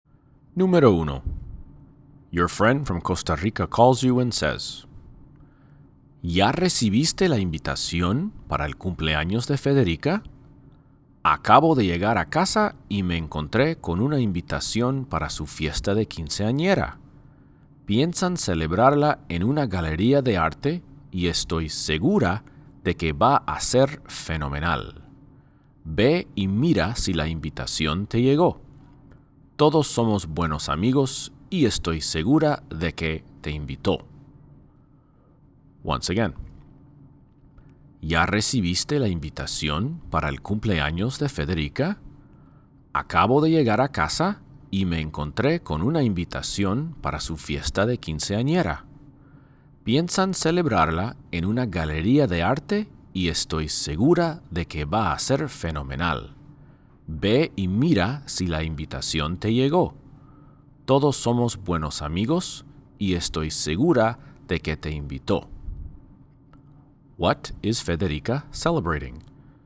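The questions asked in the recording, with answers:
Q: What is Federica celebrating?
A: Her quinceañera (15th birthday)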